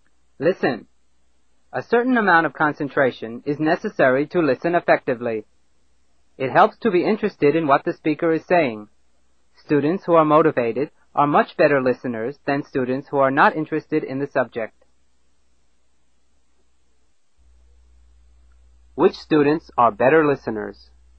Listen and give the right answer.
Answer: Students who are motivated.